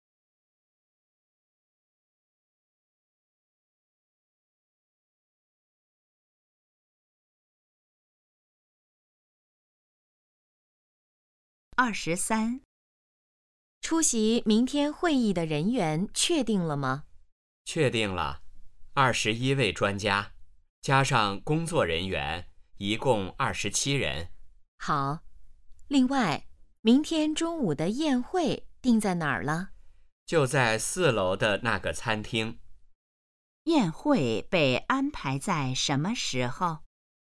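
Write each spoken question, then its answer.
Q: 宴会被安排在什么时候?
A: 明天中午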